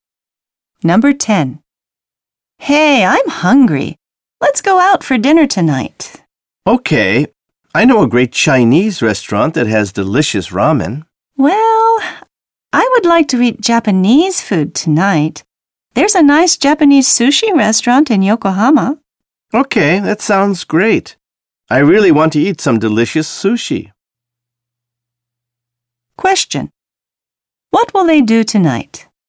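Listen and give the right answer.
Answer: Eat sushi at a Japanese restaurant in Yokohama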